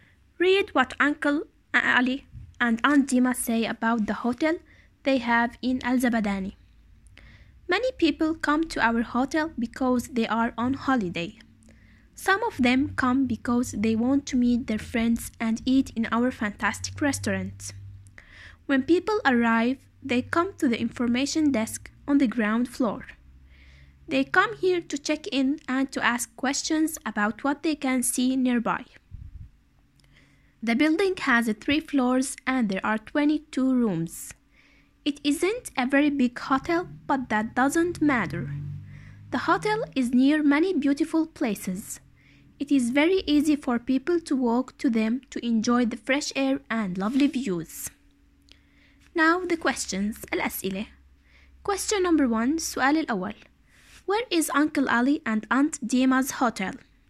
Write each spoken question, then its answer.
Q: Where is Uncle Ali and Aunt Dima's hotel?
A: It is in Al-Zabadani.